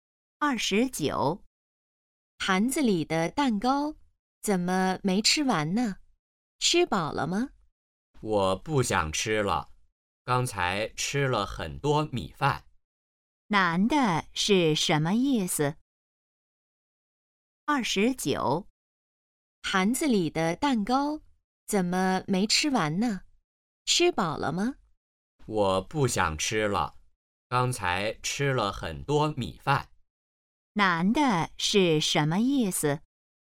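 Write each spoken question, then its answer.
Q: 男的是什么意思?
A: 吃饱了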